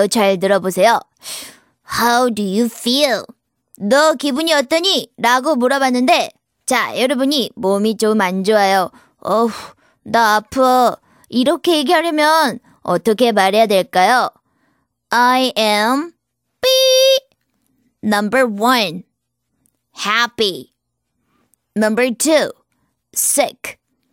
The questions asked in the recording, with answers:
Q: 나 아파. 이렇게 얘기하려면 어떻게 말해야 될까요?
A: 정답이 2번이었답니다.